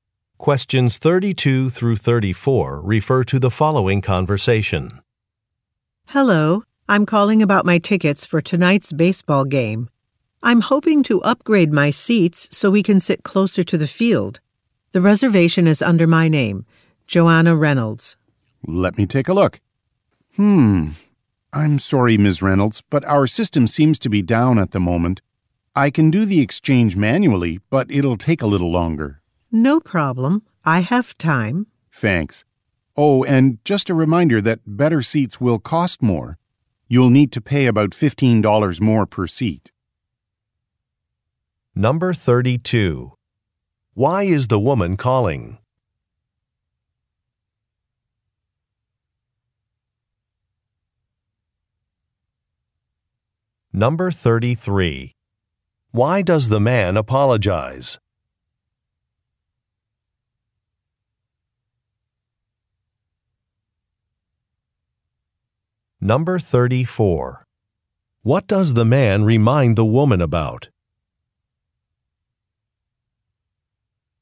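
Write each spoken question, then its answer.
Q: Why is the woman calling?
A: To upgrade her seats for tonight's baseball game

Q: Why does the man apologize?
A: The system is down

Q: What does the man remind the woman about?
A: Better seats cost more (about $15 more per seat)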